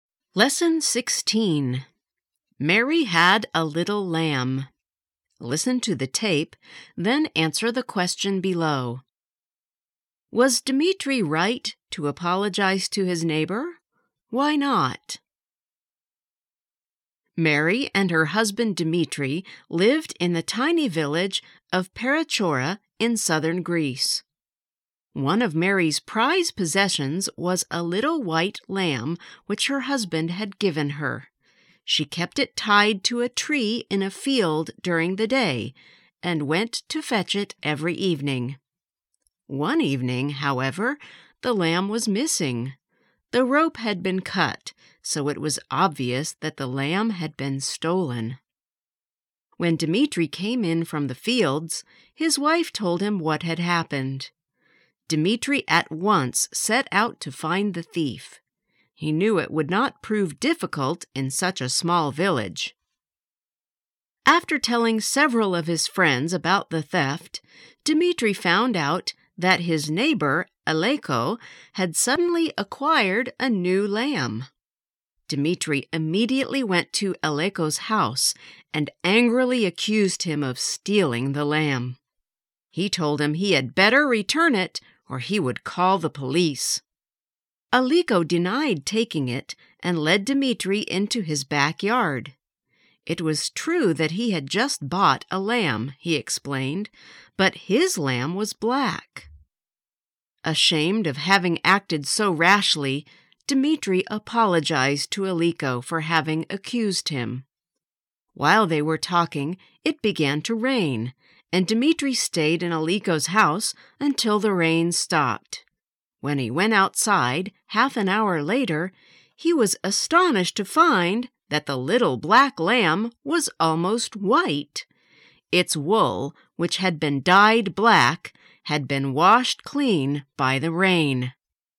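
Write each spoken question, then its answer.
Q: Was Dmitri right to apologize to his neighbor?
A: No, because Aleko had stolen the lamb and dyed it black; the rain washed the dye off and showed it was white.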